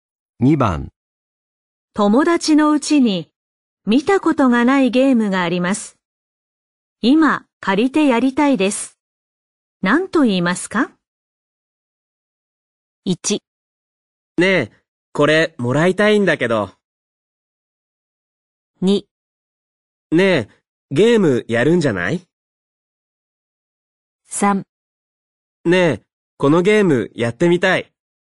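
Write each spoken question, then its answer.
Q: 何と言いますか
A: 3: ねえ、このゲームやってみたい。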